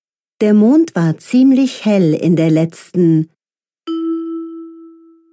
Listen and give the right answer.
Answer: Nacht.